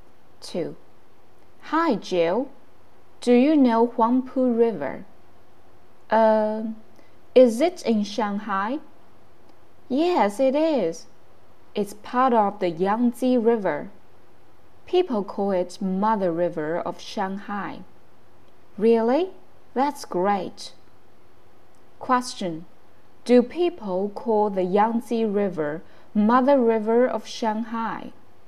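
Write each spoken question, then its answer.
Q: Do people call the Yangtze River Mother River of Shanghai?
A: No, they call the Huangpu River Mother River of Shanghai.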